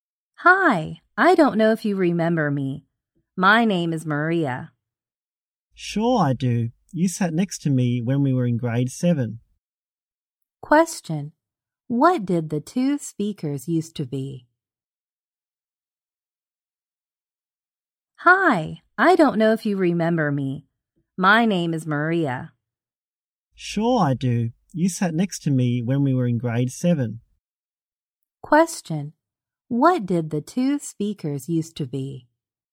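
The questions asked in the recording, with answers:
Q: What did the two speakers used to be?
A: Classmates (in grade 7).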